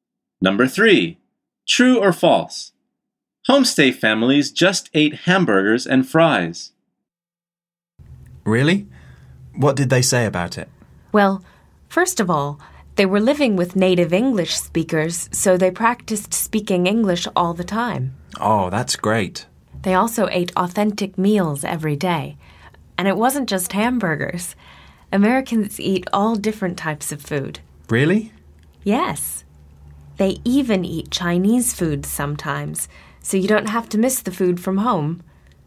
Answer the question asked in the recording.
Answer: The answer is false.